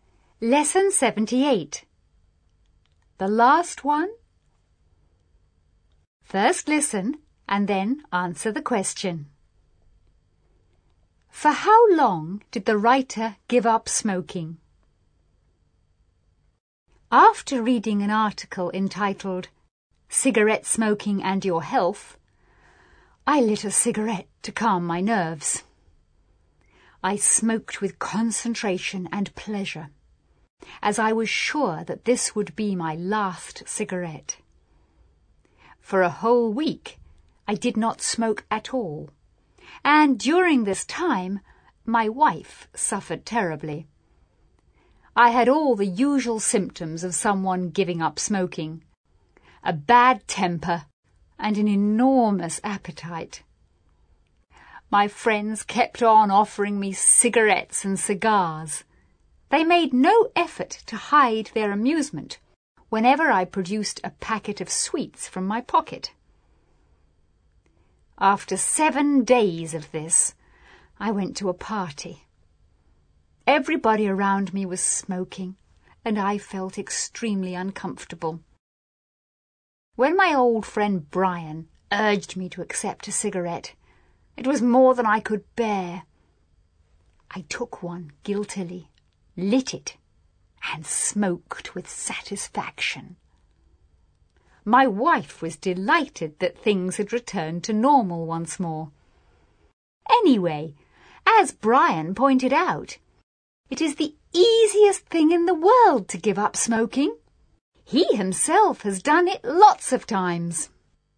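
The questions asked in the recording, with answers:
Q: For how long did the writer give up smoking?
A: For a whole week (7 days)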